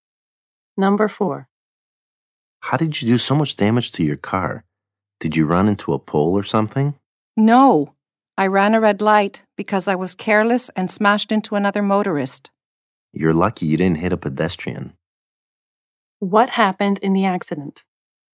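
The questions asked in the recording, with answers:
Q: What happened in the accident?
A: He ran a red light and hit another motorist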